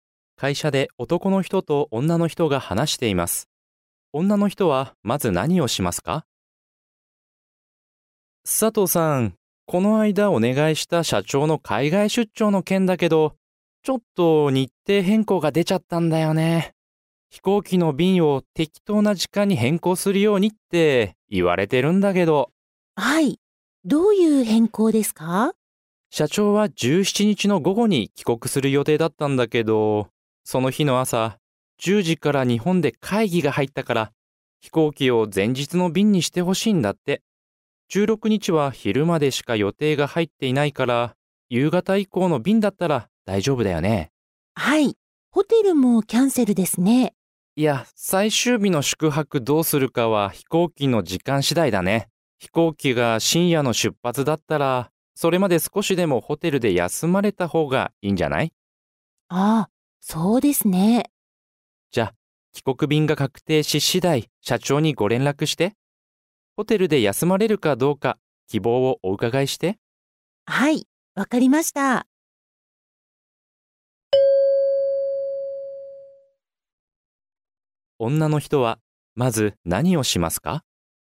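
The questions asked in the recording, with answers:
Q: 女の人は、まず何をしますか?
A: 社長の帰国便を16日夕方以降の便に変更する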